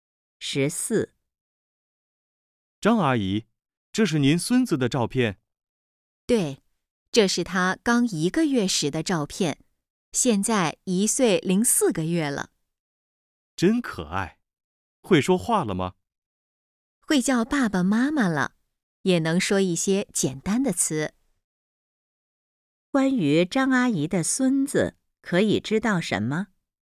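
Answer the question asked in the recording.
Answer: 会叫爸爸妈妈,能说一些简单的词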